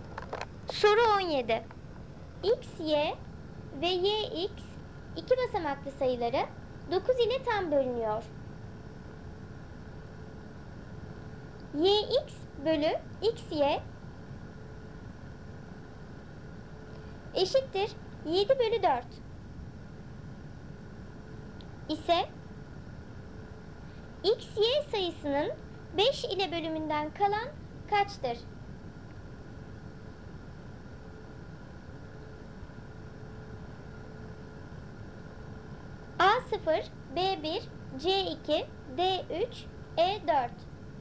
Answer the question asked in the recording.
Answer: Doğru cevap B1.